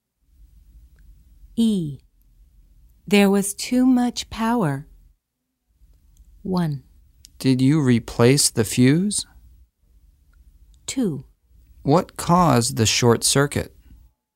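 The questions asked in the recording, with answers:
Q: There was too much power.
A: 2: What caused the short circuit?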